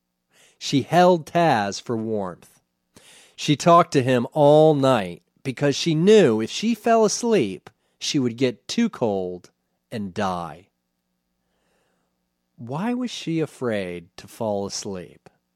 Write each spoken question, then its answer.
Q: Why was she afraid to fall asleep?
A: If she fell asleep, she would get too cold and die.